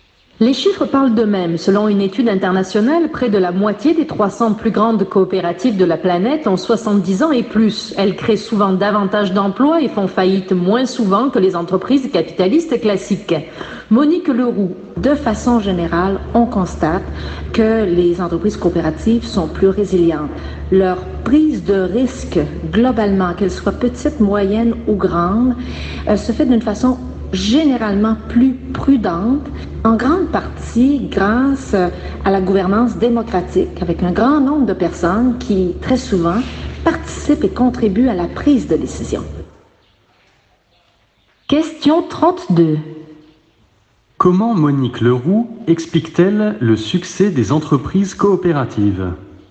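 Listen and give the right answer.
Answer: Par leur gouvernance démocratique : beaucoup de personnes participent aux décisions, ce qui rend la prise de risque plus prudente.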